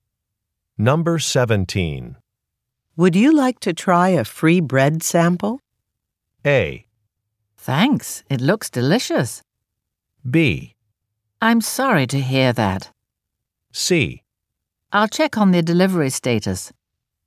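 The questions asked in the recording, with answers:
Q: Would you like to try a free bread sample?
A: A: Thanks, it looks delicious.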